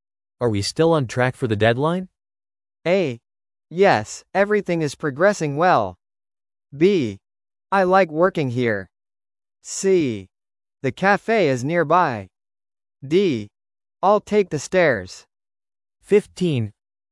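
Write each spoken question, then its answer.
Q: Are we still on track for the deadline?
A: A: Yes, everything is progressing well.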